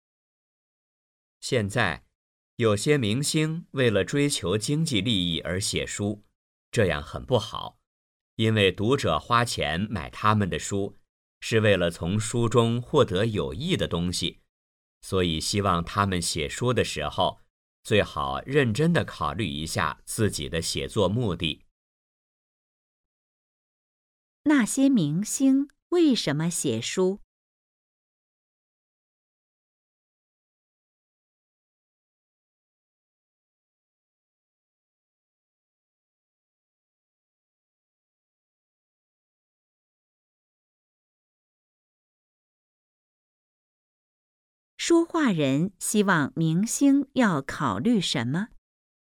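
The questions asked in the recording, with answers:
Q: 那些明星为什么写书?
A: 为了追求经济利益

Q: 说话人希望明星要考虑什么?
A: 自己的写作目的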